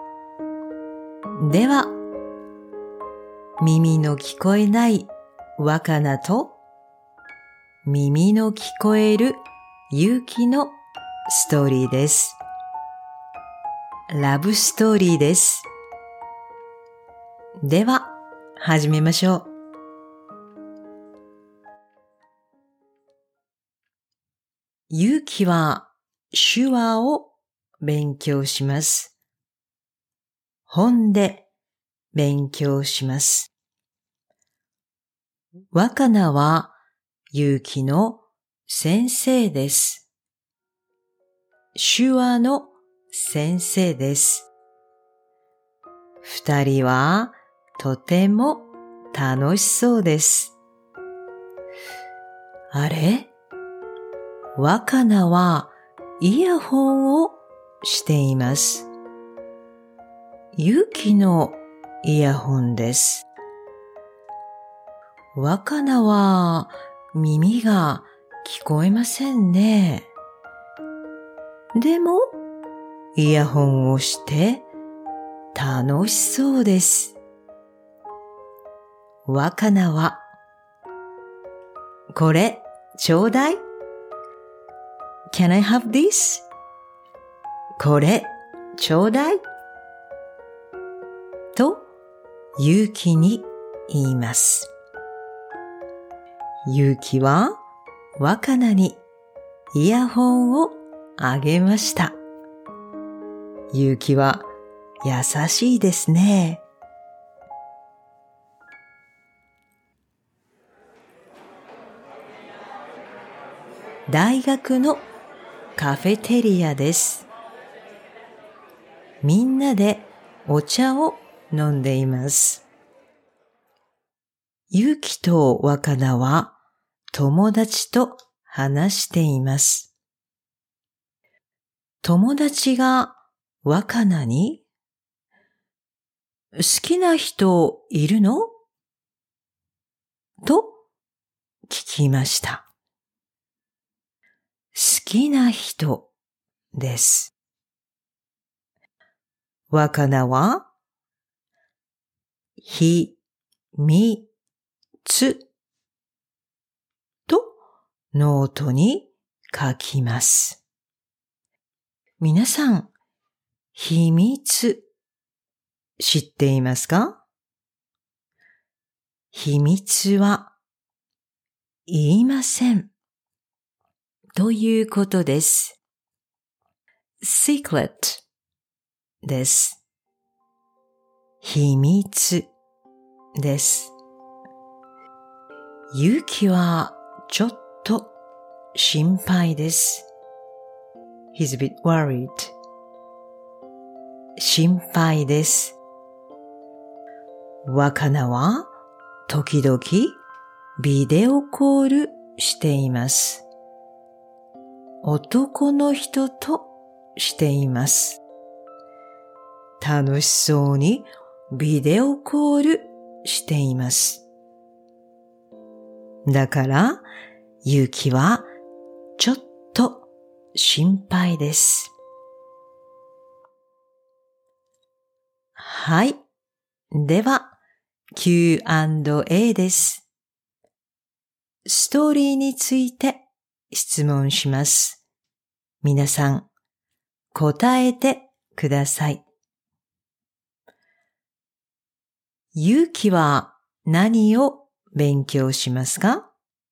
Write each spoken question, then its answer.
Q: 勇気は何を勉強しますか?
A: 手話です。手話を勉強します。